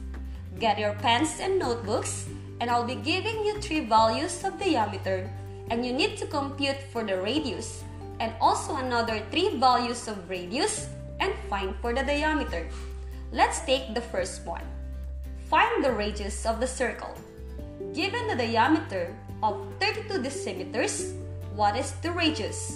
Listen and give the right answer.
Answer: You're right, it is 16 decimeters.